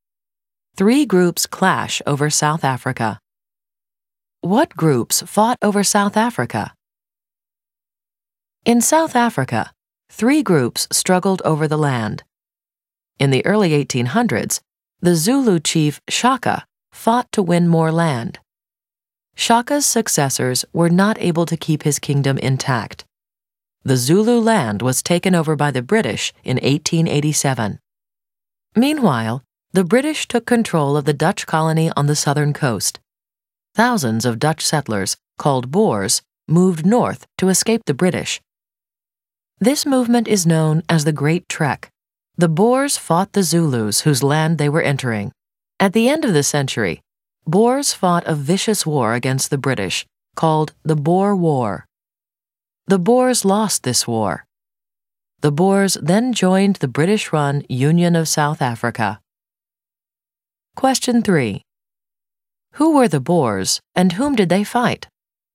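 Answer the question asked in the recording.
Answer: Dutch settlers in South Africa; they fought the Zulus and the British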